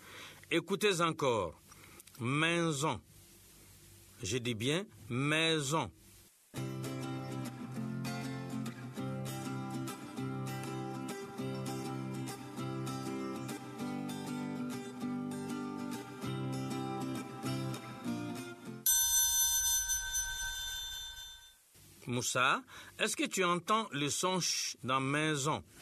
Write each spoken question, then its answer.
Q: Moussa, est-ce que tu entends le son ch dans maison?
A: Non, monsieur. Dans maison, il n'y a pas le son ch.